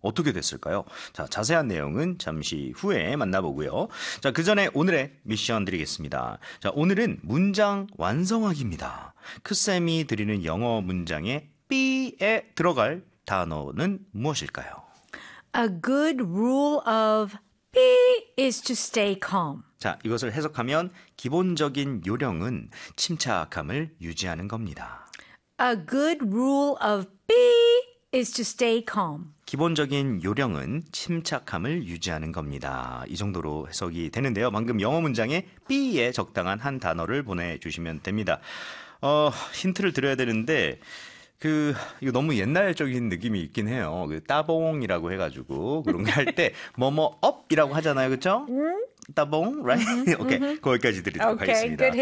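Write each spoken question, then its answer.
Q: 크쌤이 드리는 영어 문장에 B에 들어갈 단어는 무엇일까요?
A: thumb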